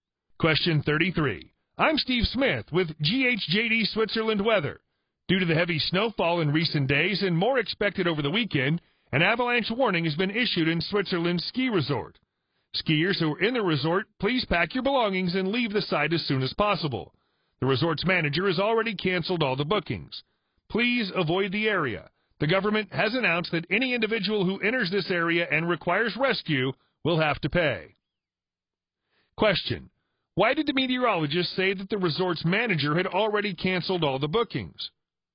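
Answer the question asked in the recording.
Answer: Because an avalanche warning was issued after heavy snowfall, so people should avoid the resort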